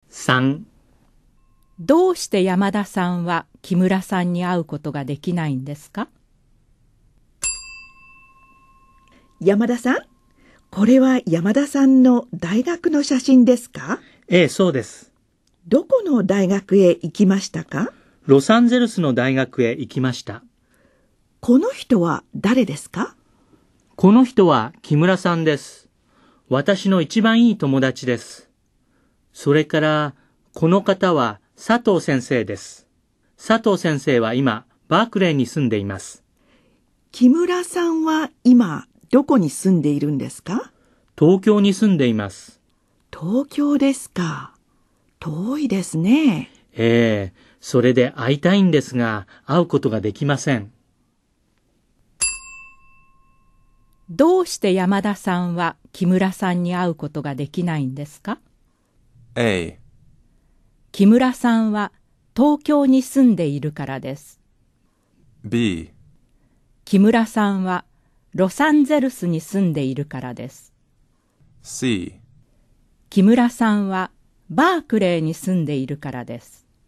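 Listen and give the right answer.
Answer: A: 木村さんは東京に住んでいるからです。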